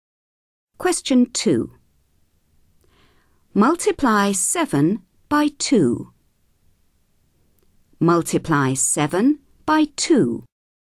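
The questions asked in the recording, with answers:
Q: Multiply 7 by 2.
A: 14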